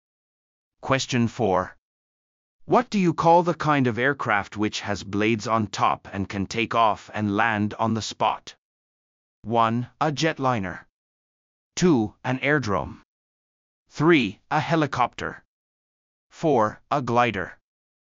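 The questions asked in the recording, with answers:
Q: What do you call the kind of aircraft which has blades on top and can take off and land on the spot?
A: 3: A helicopter.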